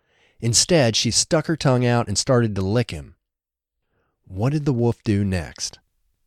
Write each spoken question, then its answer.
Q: What did the wolf do next?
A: The wolf stuck her tongue out and started to lick him.